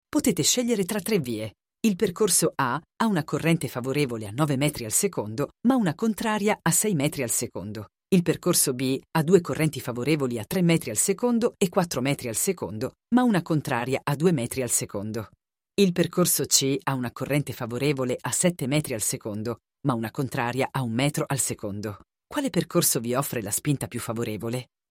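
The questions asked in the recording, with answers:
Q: Quale percorso vi offre la spinta più favorevole?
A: Il percorso C (spinta netta di 6 metri al secondo)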